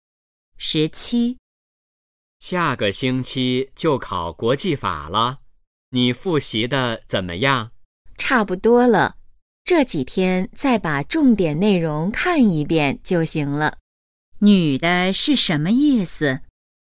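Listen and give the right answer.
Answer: 复习得差不多了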